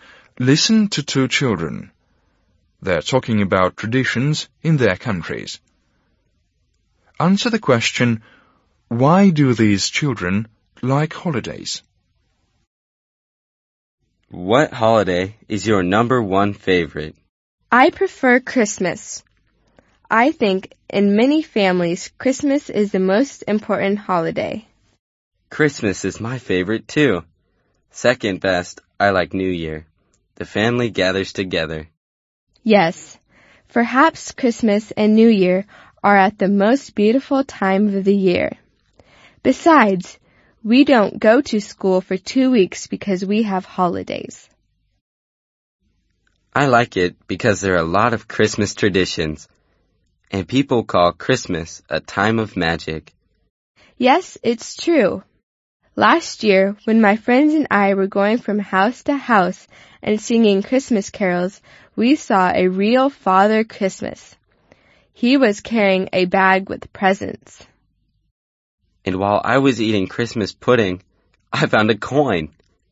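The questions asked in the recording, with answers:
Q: why do these children like holidays?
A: Families gather together, it's a beautiful time of year, there's no school for 2 weeks, and there are many traditions and magic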